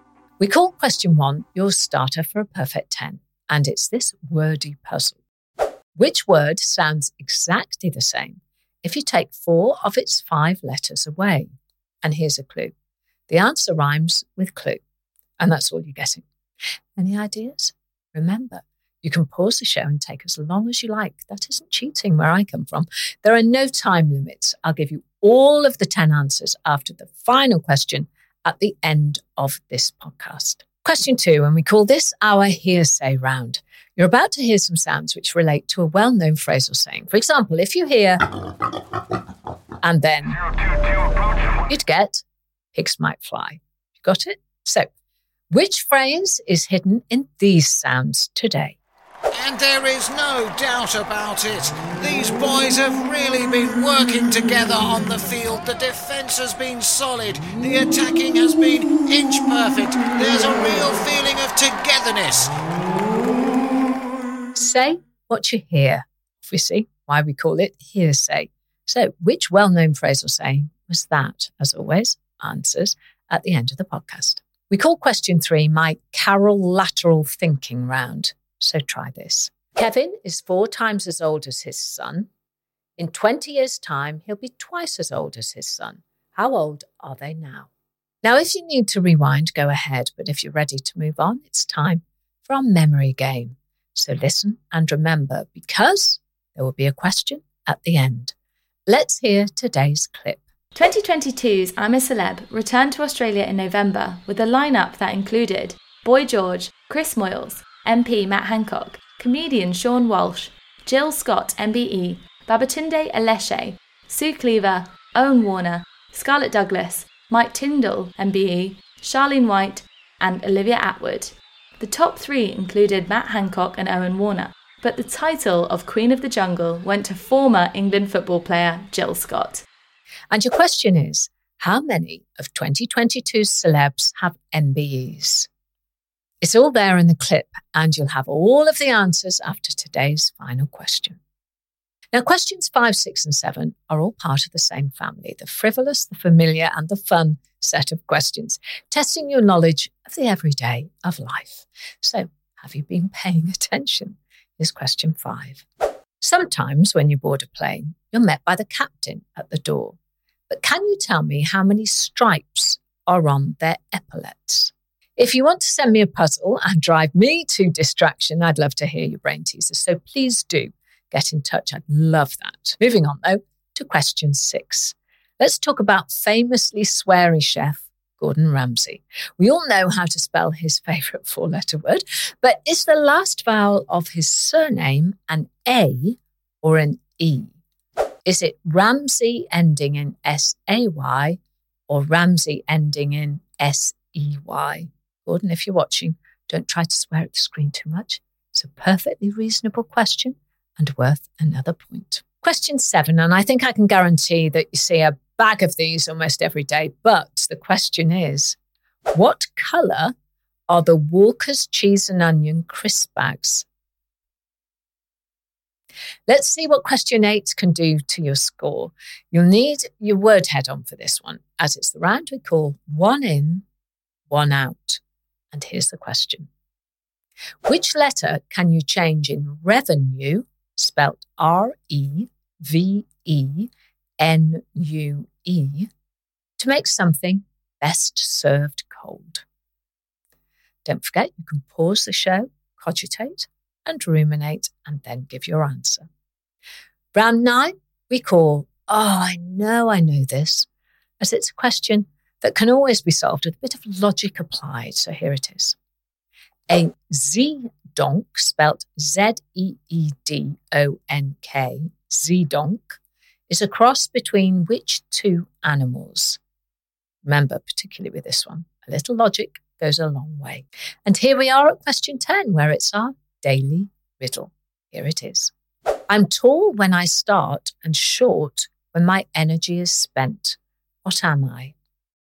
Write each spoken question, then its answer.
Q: How old are they now?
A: Well, right now, Kevin is 40 years old and his son is 10 years old.

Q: how many of 2022's celebs have MBEs?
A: that answer was 2 of them.

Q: Which letter can you change in revenue, spelt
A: And the answer is you change the letter U to the letter G and you're busy getting revenge, which the saying says is best served cold.